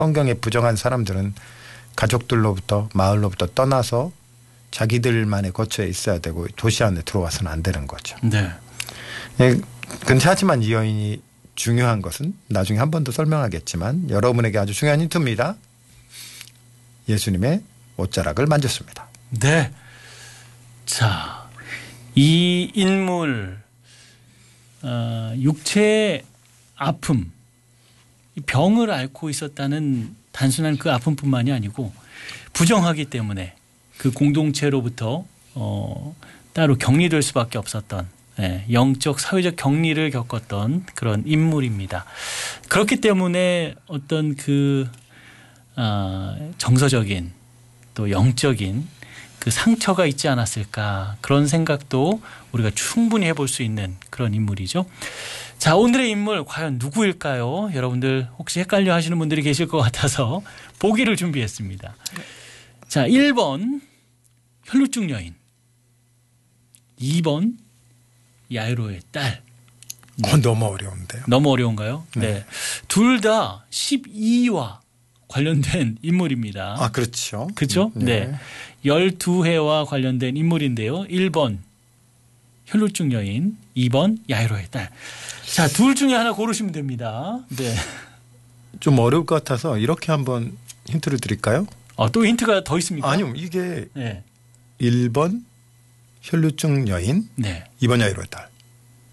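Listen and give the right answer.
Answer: 1: 혈루증 여인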